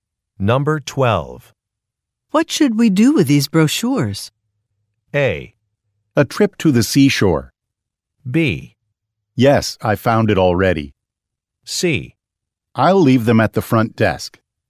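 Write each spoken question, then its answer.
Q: What should we do with these brochures?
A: C: I'll leave them at the front desk.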